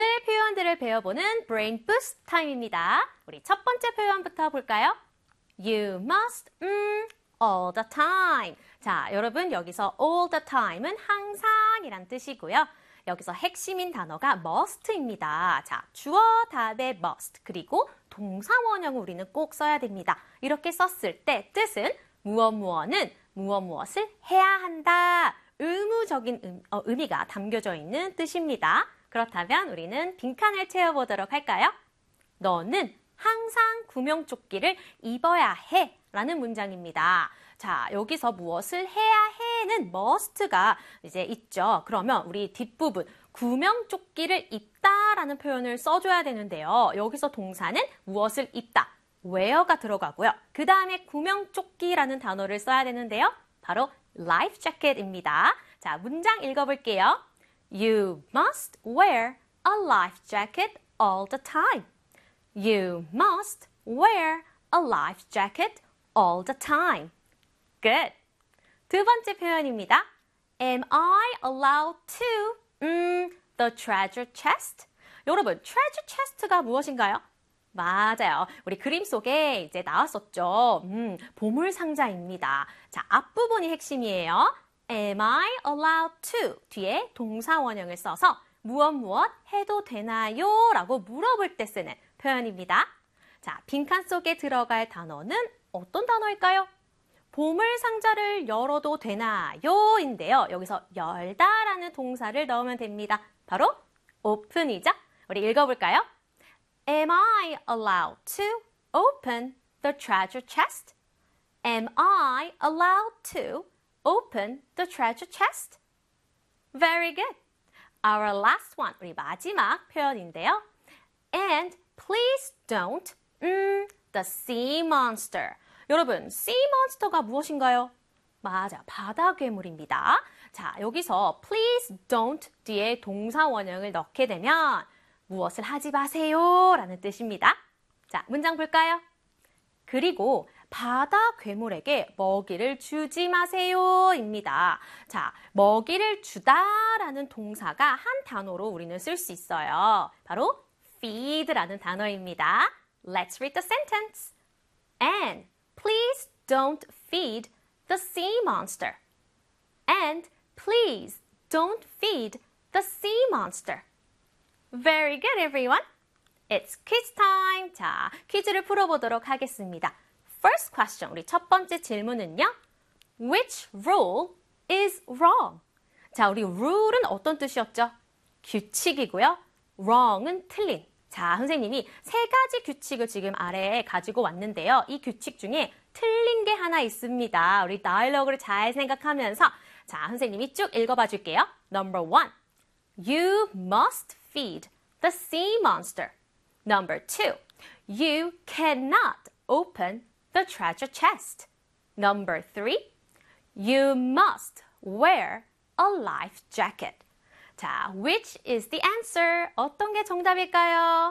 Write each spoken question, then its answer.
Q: Which rule is wrong?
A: The answer is number one.